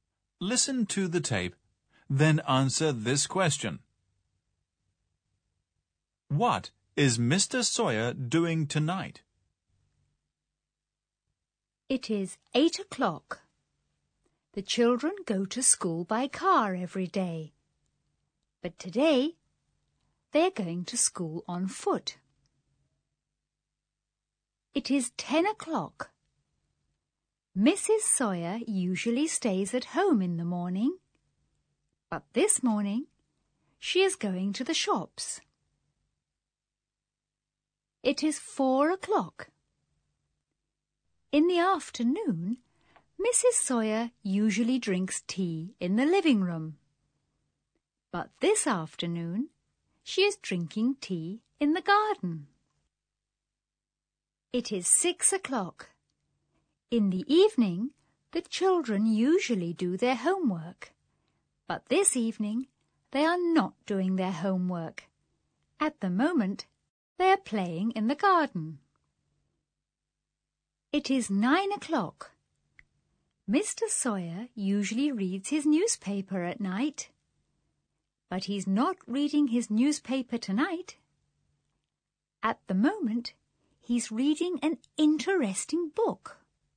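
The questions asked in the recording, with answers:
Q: What is Mr. Sawyer doing tonight?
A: He's reading an interesting book.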